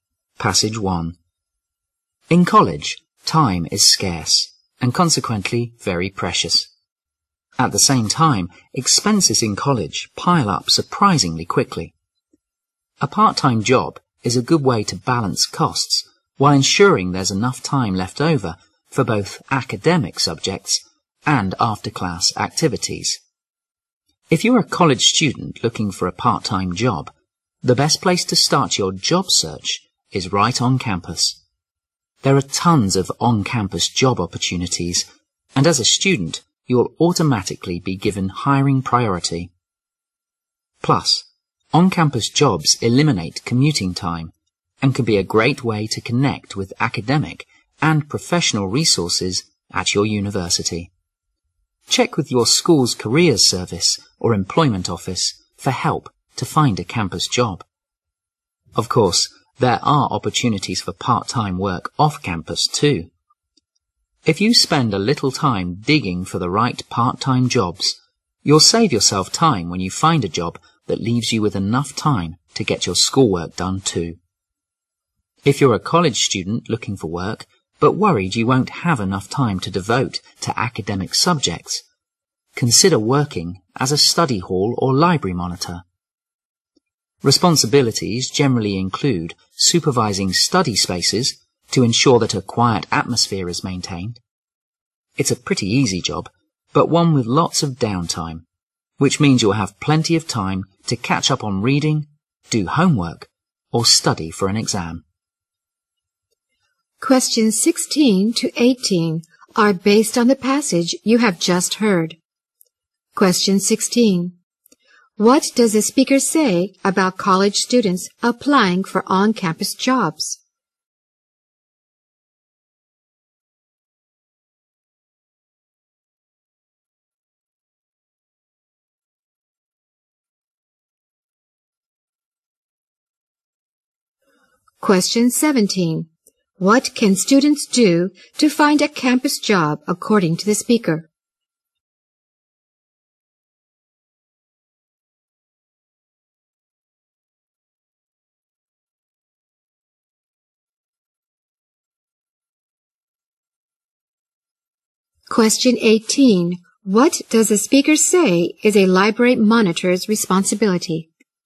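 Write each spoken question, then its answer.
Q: What does the speaker say about college students applying for on-campus jobs?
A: They are given hiring priority

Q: What can students do to find a campus job according to the speaker?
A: Check with the school's careers service or employment office

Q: What does the speaker say is a library monitor's responsibility?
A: Supervising study spaces to keep them quiet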